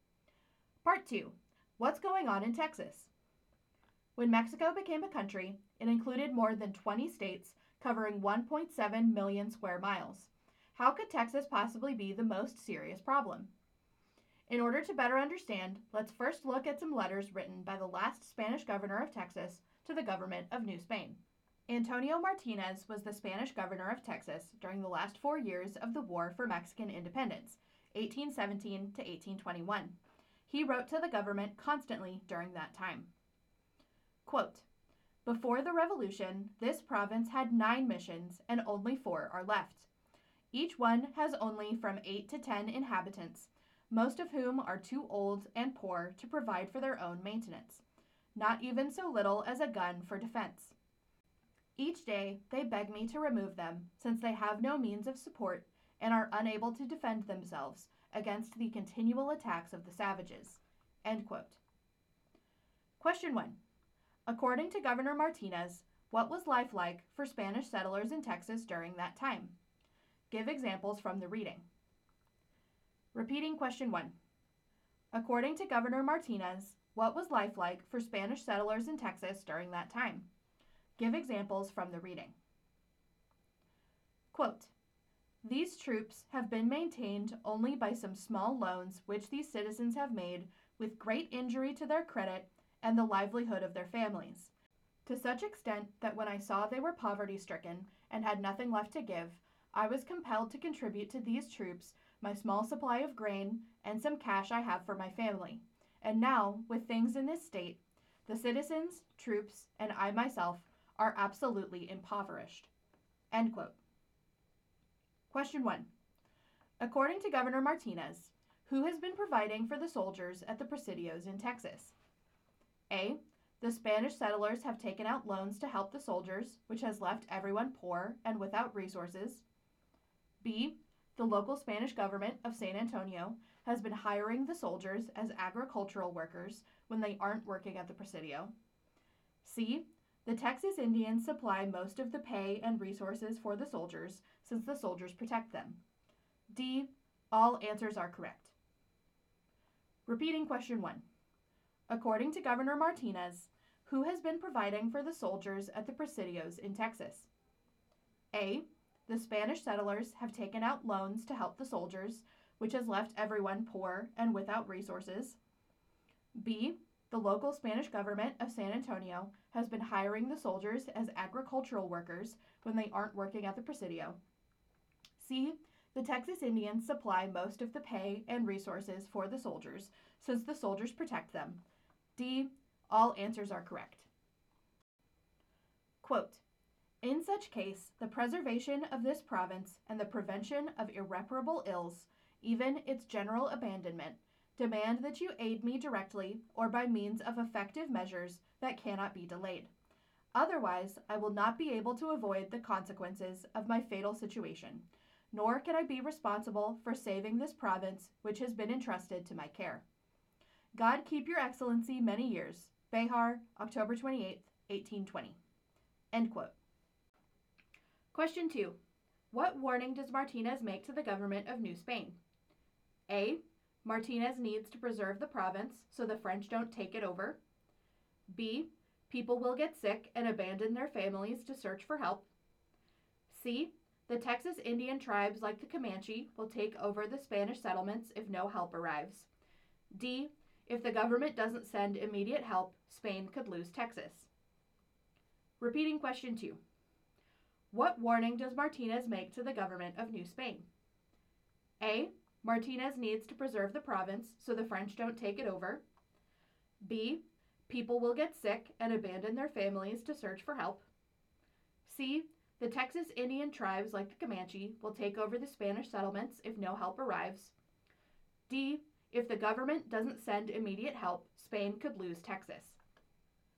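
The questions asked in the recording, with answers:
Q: According to Governor Martinez, what was life like for Spanish settlers in Texas during that time?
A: Hard: few, old, poor settlers left, unable to support or defend themselves against constant attacks

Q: According to Governor Martinez, who has been providing for the soldiers at the presidios in Texas?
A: A: The Spanish settlers have taken out loans to help the soldiers, which has left everyone poor and without resources.

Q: What warning does Martinez make to the government of New Spain?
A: D: If the government doesn't send immediate help, Spain could lose Texas.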